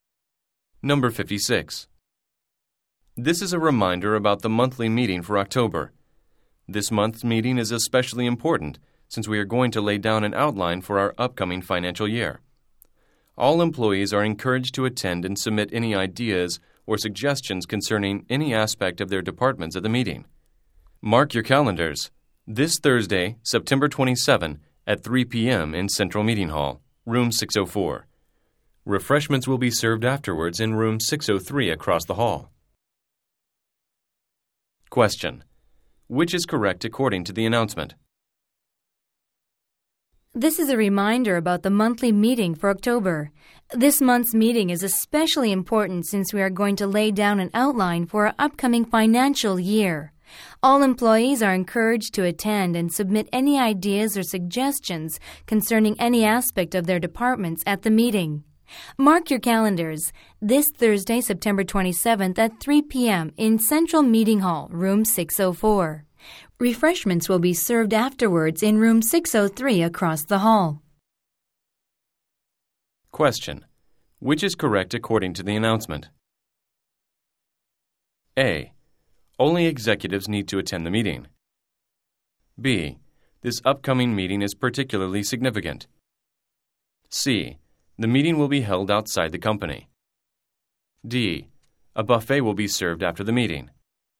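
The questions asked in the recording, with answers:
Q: Which is correct according to the announcement?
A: B: This upcoming meeting is particularly significant.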